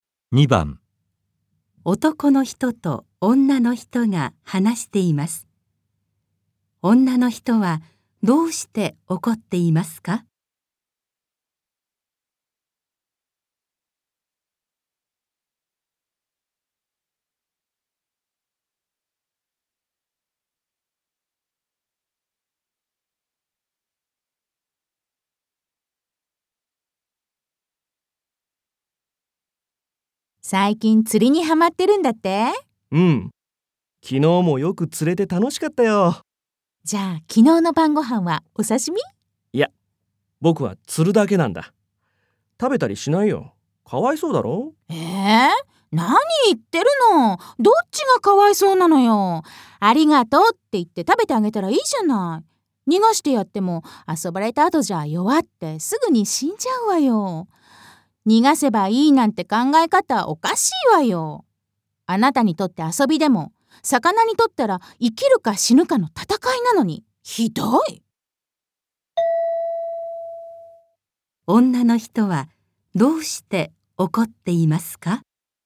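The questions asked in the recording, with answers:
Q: 女の人はどうして怒っていますか?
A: 男の人が魚を遊びで釣って、食べずに逃がしているから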